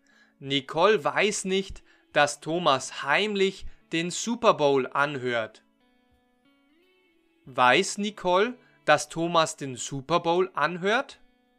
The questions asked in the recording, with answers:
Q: Weiß Nicole, dass Thomas den Super Bowl anhört?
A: Nein, sie weiß es nicht. Nicole weiß nicht, dass Thomas den Super Bowl anhört.